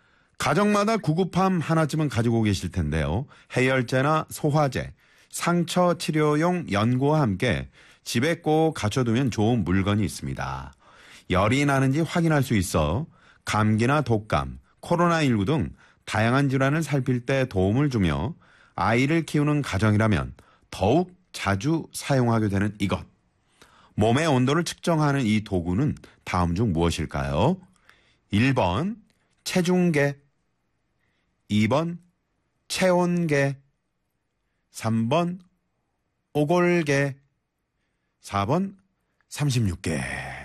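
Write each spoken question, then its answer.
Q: 몸의 온도를 측정하는 이 도구는 다음 중 무엇일까요?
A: 2번: 체온계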